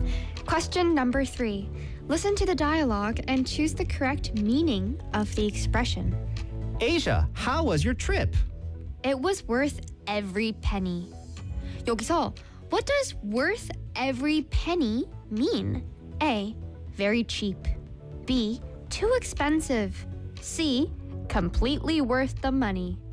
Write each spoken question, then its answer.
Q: 여기서 what does worth every penny mean?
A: 맞췄습니다.